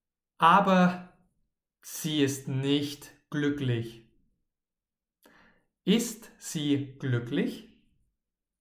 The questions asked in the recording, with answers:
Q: Ist sie glücklich?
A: Nein, sie ist nicht glücklich.